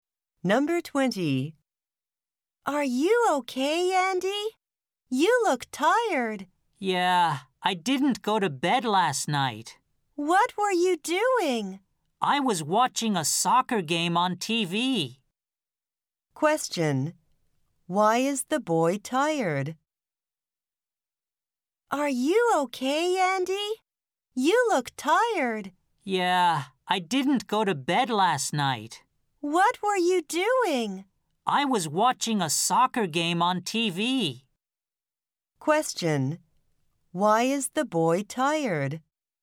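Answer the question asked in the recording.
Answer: He stayed up all night watching a soccer game on TV.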